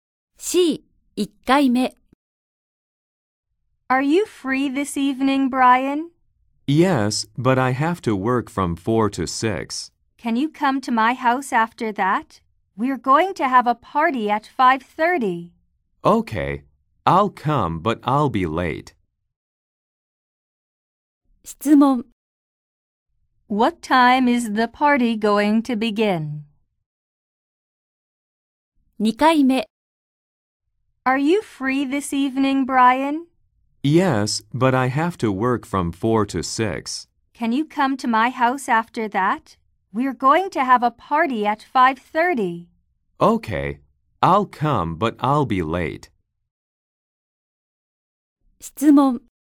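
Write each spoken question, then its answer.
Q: What time is the party going to begin?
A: At 5:30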